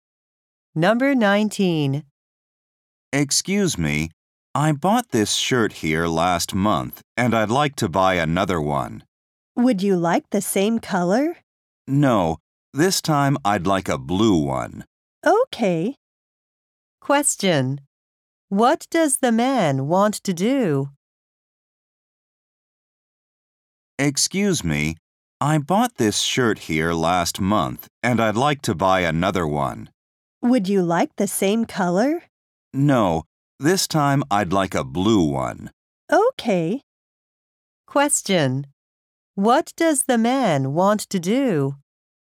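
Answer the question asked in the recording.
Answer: Buy another shirt in blue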